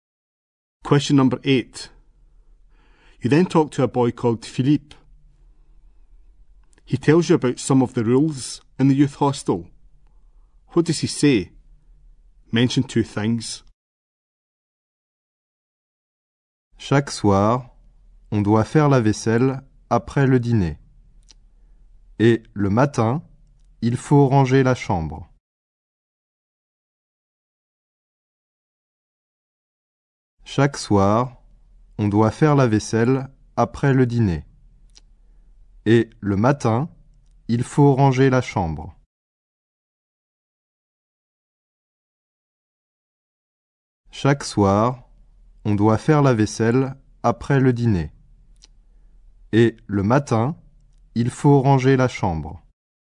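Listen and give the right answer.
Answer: Do the washing-up after dinner every evening; tidy the room in the morning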